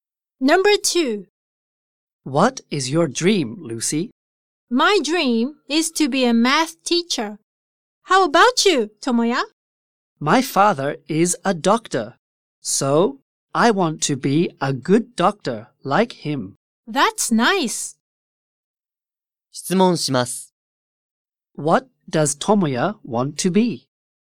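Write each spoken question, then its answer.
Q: What does Tomoya want to be?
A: A doctor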